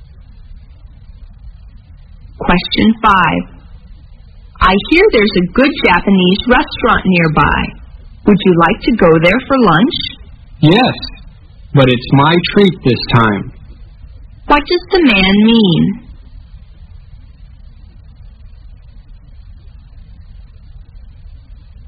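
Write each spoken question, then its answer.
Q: What does the man mean?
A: He will pay for lunch this time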